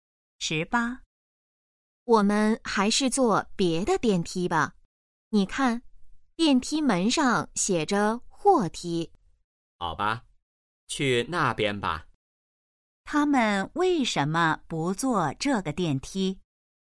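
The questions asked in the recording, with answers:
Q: 他们为什么不坐这个电梯?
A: 那是货梯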